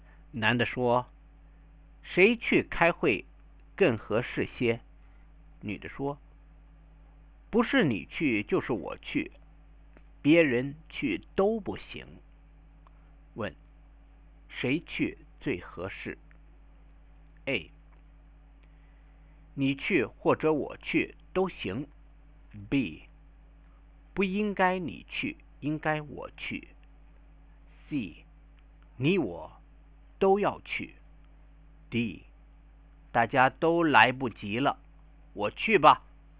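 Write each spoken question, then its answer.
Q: 谁去最合适?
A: A: 你去或者我去都行。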